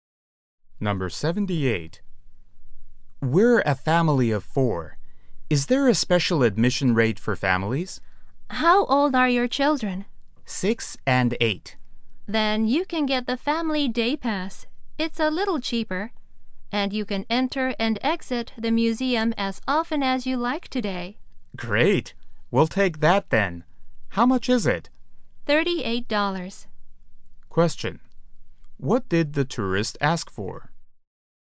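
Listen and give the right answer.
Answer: A special family admission rate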